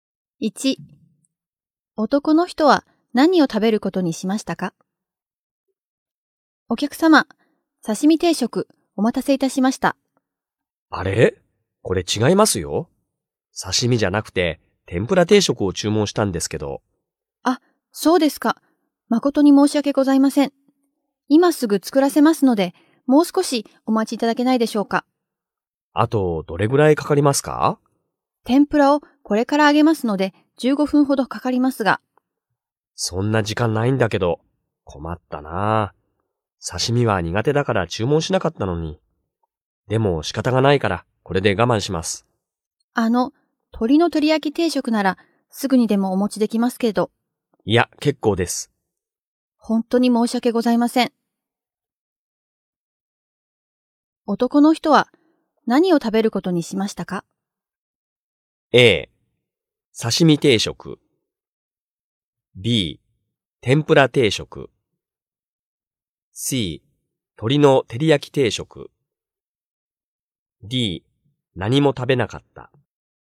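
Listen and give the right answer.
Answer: A: 刺身定食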